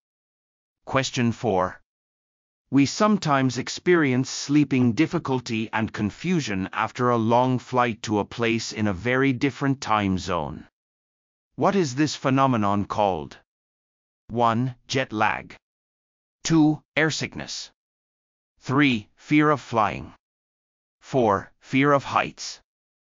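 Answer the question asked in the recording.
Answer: 1: Jet lag.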